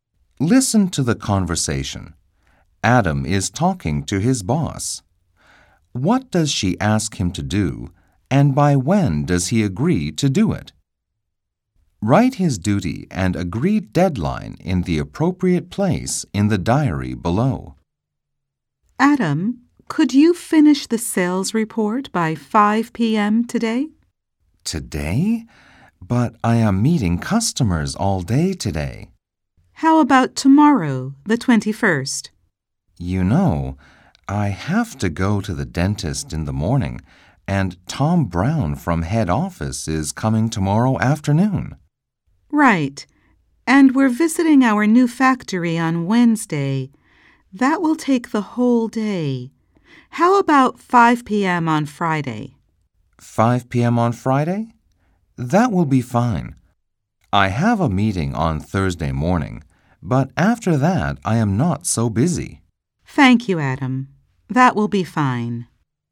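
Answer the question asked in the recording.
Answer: Finish the sales report, by 5 p.m. on Friday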